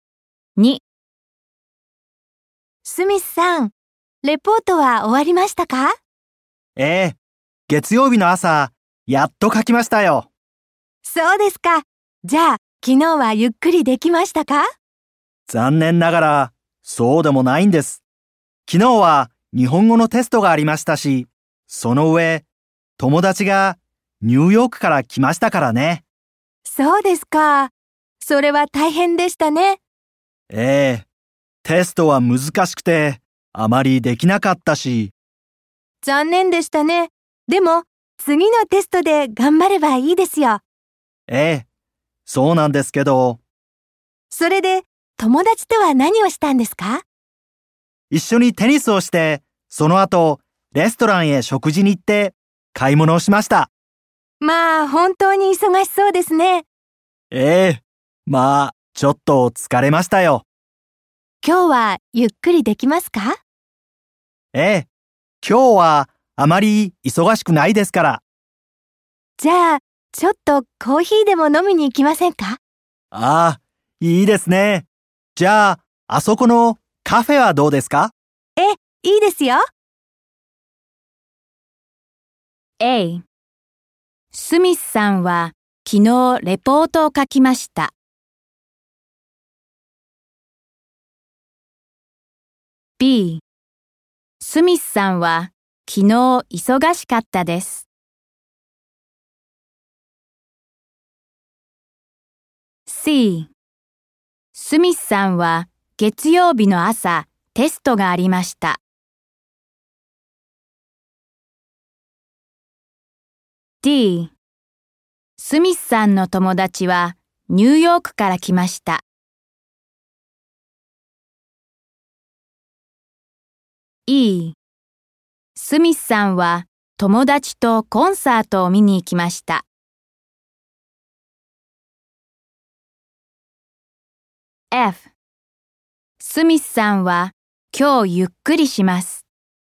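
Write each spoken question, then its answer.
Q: スミスさんは昨日忙しかったです。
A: はい

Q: スミスさんの友達はニューヨークから来ました。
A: はい

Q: スミスさんは友達とコンサートを見に行きました。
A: いいえ

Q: スミスさんは今日ゆっくりします。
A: はい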